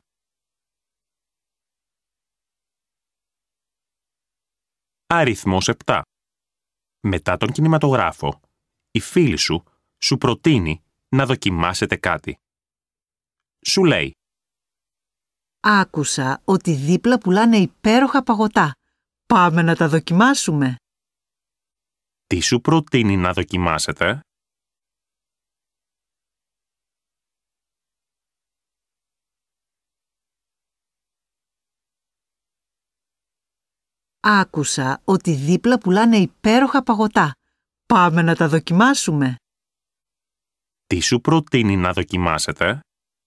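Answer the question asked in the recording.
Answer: παγωτά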